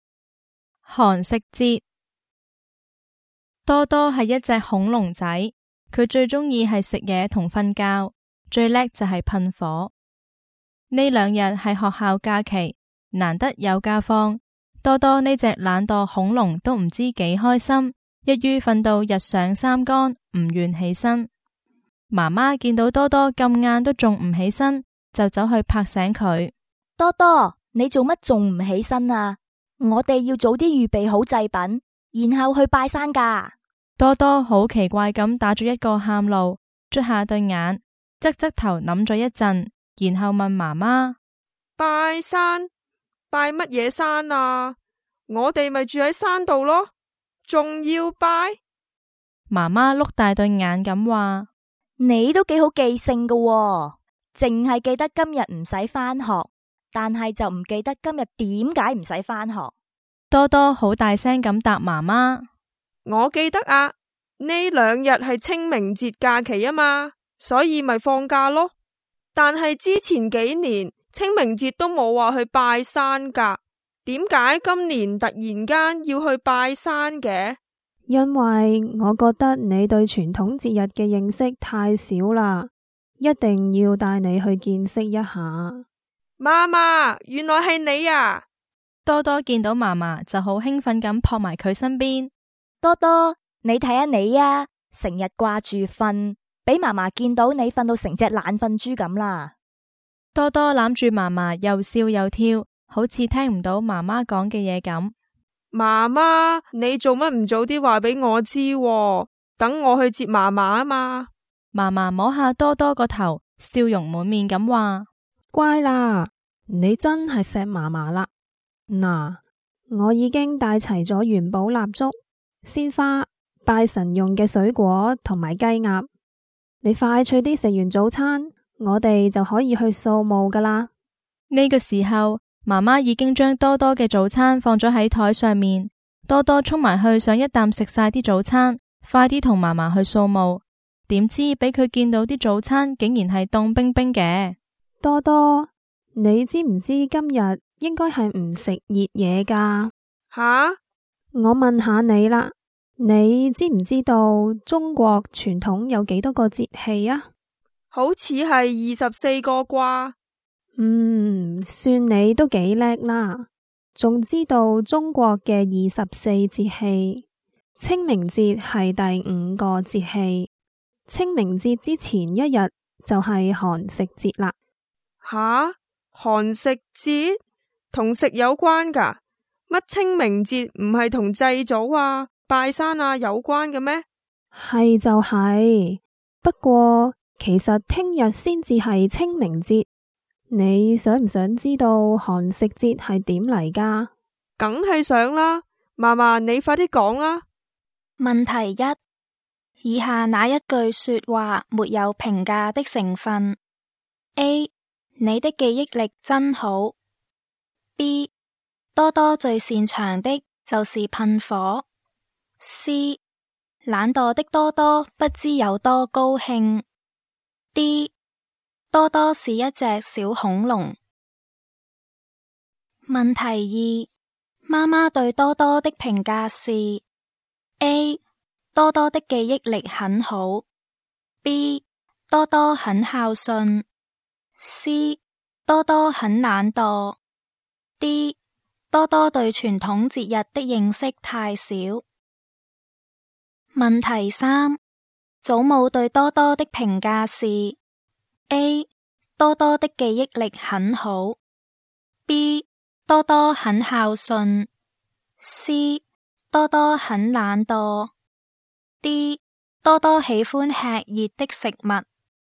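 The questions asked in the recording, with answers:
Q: 以下哪一句说话没有评价的成分 ?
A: D: 多多是一只小恐龙。

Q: 妈妈对多多的评价是 :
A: D: 多多对传统节日的认识太少。

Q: 祖母对多多的评价是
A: B: 多多很孝顺。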